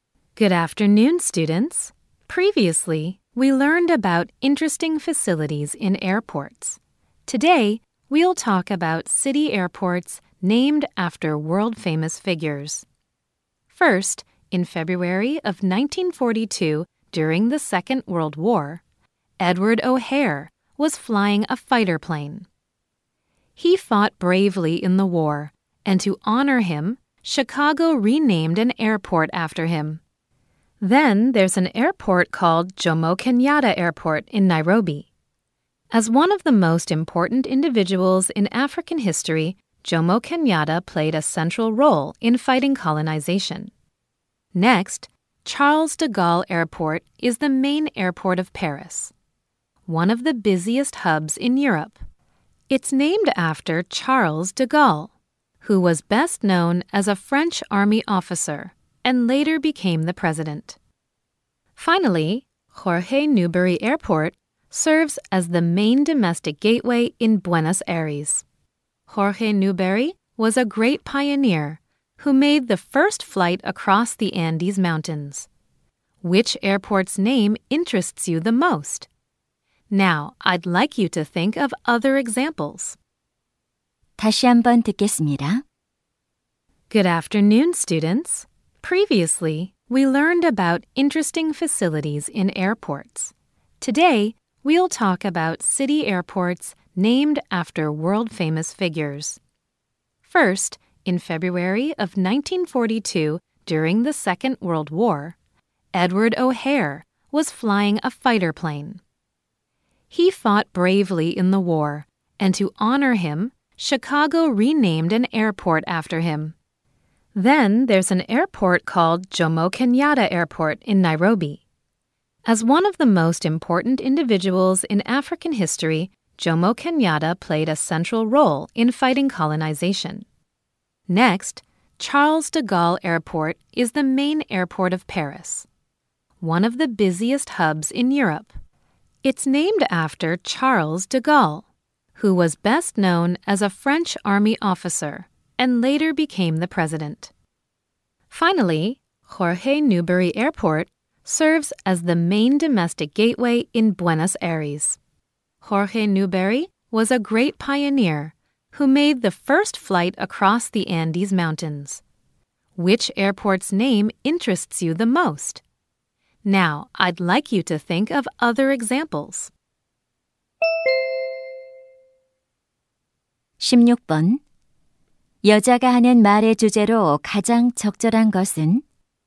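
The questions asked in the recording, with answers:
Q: 여자가 하는 말의 주제로 가장 적절한 것은?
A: 세계적인 유명 인물의 이름을 딴 도시 공항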